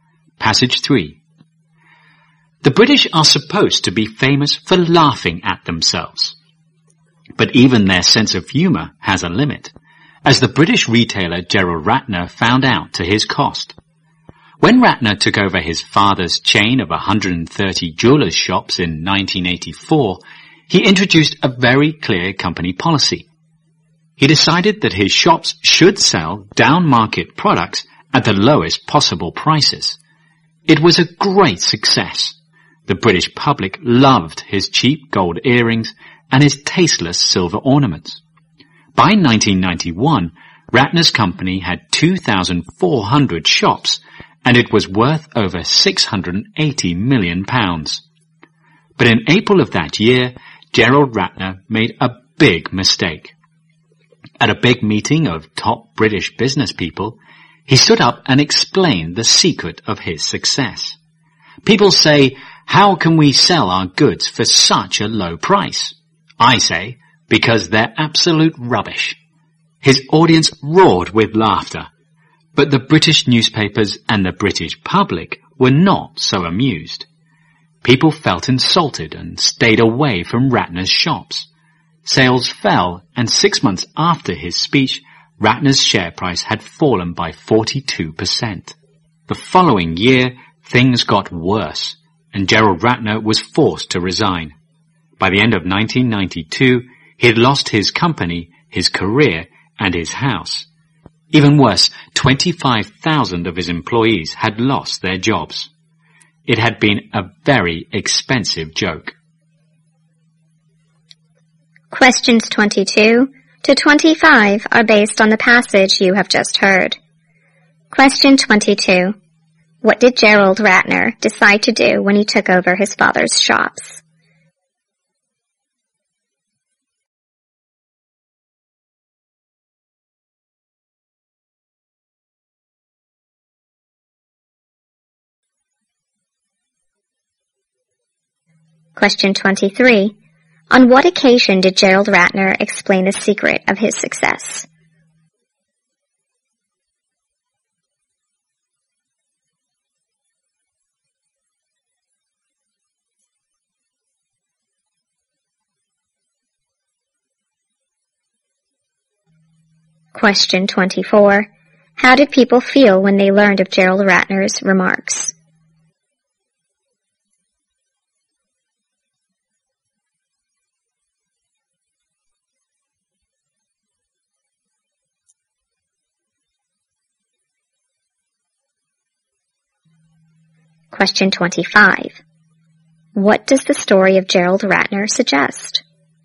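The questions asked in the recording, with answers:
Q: What did Gerald Ratner decide to do when he took over his father's shops?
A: Sell down-market products at the lowest possible prices.

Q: On what occasion did Gerald Ratner explain the secret of his success?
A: At a big meeting of top British business people.

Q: How did people feel when they learned of Gerald Ratner's remarks?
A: Insulted.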